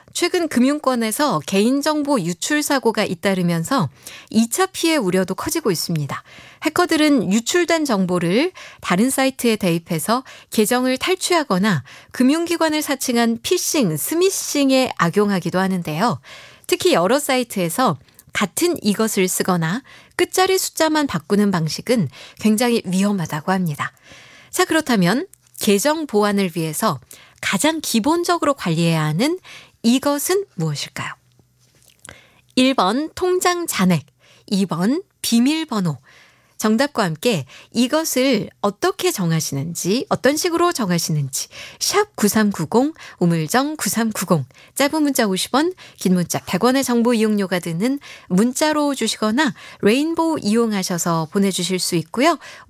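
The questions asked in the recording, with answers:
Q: 자, 그렇다면 계정 보안을 위해서 가장 기본적으로 관리해야 하는 이것은 무엇일까요?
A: 2번: 비밀번호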